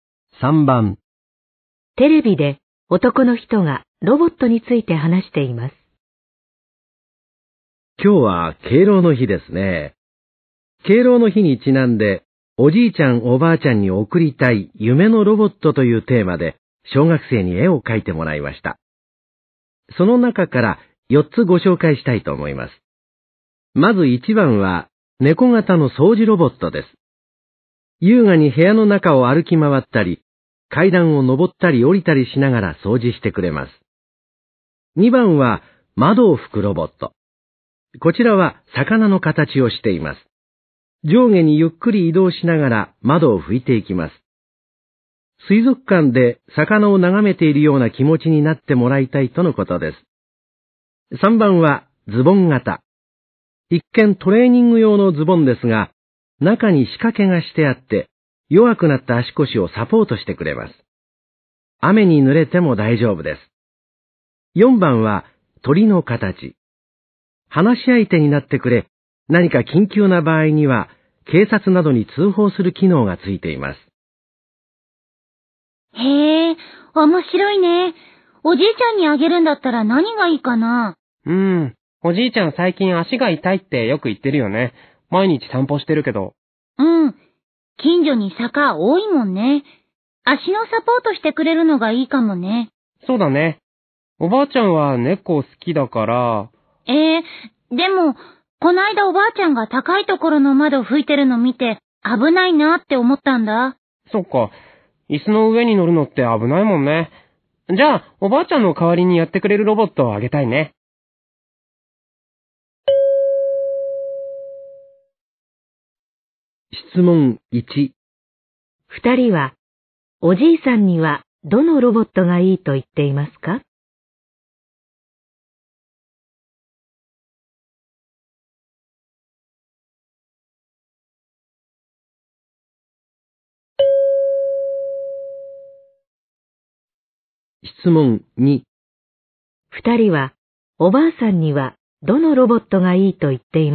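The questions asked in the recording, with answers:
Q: 二人は、おじいさんにはどのロボットがいいと言っていますか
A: 3番のズボン型のロボット

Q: 人は、おばあさんにはどのロボットがいいと言ってい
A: 2番の窓を拭く魚型のロボット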